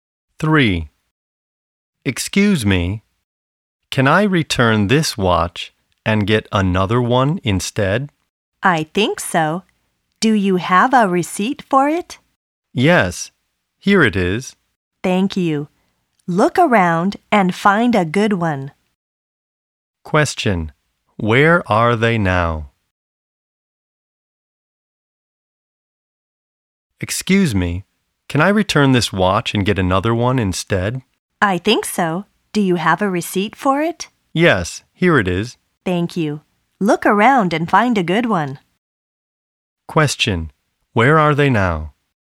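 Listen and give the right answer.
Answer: At a watch shop.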